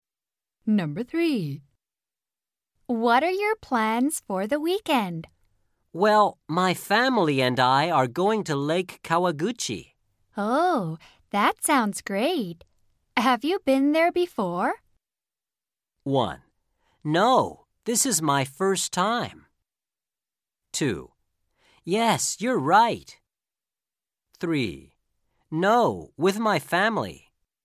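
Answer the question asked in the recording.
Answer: 1: No, this is my first time.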